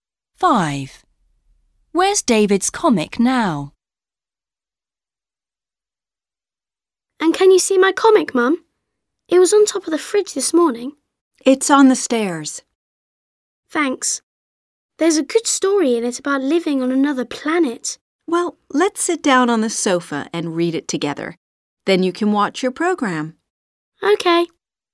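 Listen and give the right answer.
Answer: On the stairs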